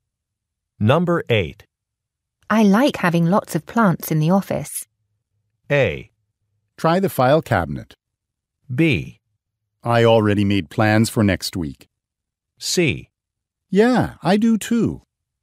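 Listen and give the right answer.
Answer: C: Yeah, I do too.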